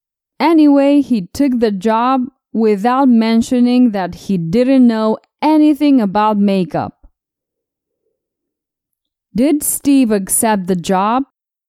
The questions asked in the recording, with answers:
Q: Did Steve accept the job?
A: Yes, he accepted the job.